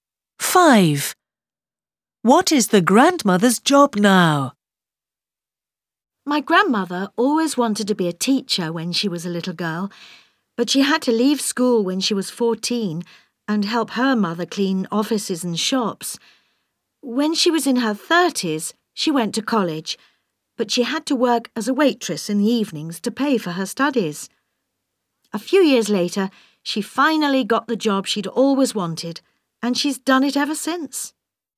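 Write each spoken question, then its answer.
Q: Five. What is the grandmother's job now?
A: teacher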